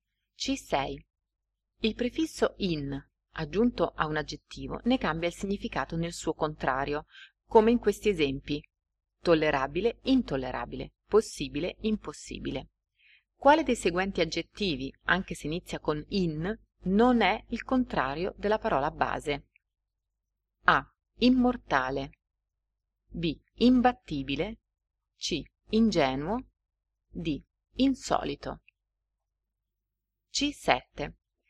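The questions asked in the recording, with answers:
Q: Quale dei seguenti aggettivi, anche se inizia con in, non è il contrario della parola base?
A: C: Ingenuo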